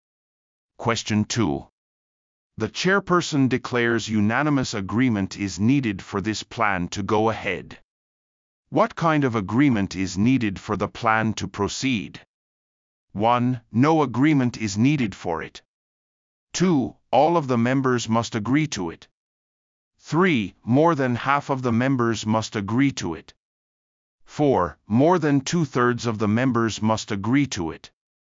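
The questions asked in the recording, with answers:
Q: What kind of agreement is needed for the plan to proceed?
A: 2: All of the members must agree to it.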